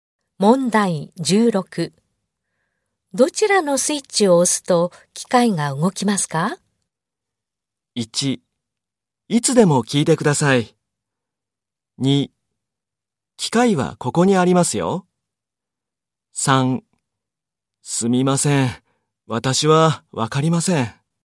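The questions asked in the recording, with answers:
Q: どちらのスイッチを押すと機械が動きますか?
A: 1: すみません。私はわかりません。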